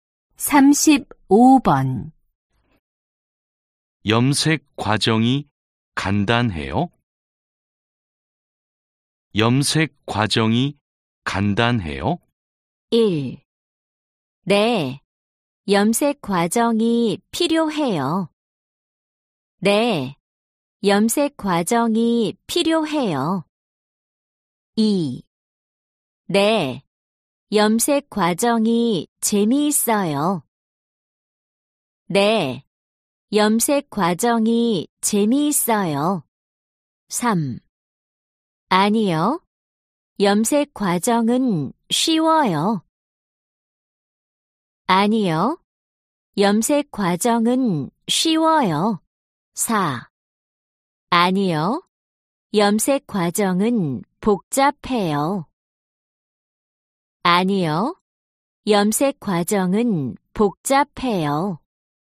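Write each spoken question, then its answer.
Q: 염색 과정이 간단해요?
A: 4: 아니요. 염색 과정은 복잡해요.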